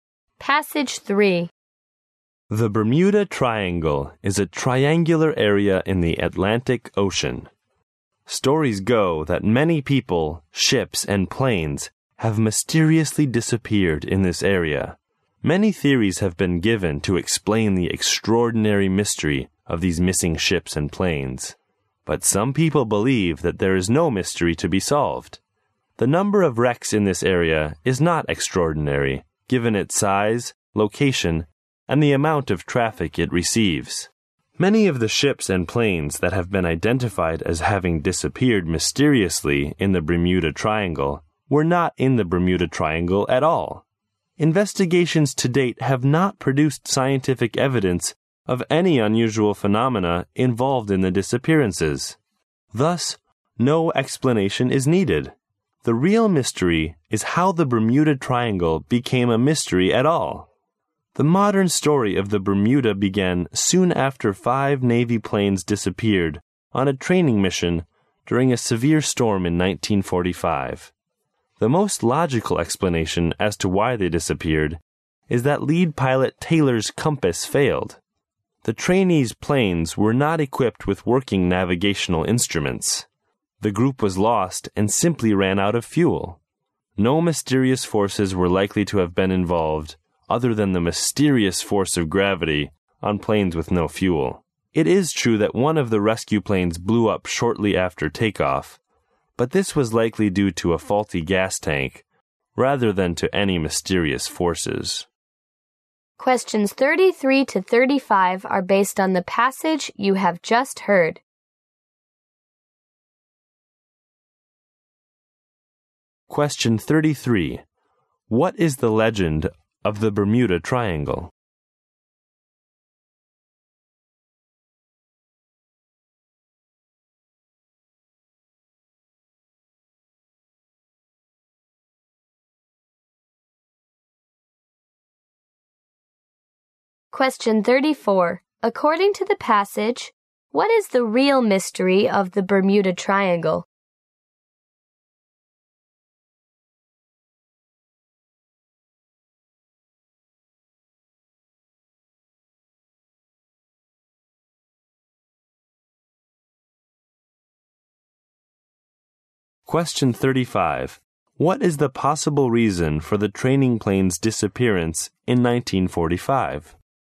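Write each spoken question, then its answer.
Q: What is the legend of the Bermuda Triangle?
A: Many ships and planes have mysteriously disappeared there

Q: According to the passage, what is the real mystery of the Bermuda Triangle?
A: How it became a mystery at all

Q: What is the possible reason for the training plane's disappearance in 1945?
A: The lead pilot's compass failed, and the planes got lost and ran out of fuel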